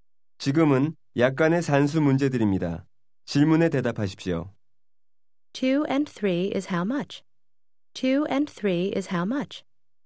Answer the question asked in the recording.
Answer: 2 and 3 is 5.